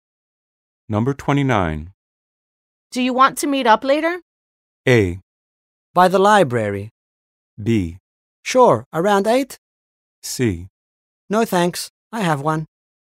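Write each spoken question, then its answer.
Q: Do you want to meet up later?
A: B: Sure, around 8?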